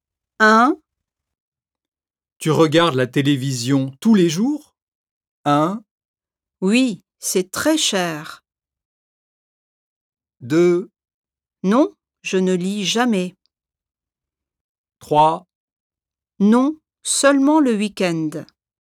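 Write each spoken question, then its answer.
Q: Tu regardes la télévision tous les jours?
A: 3: Non, seulement le week-end.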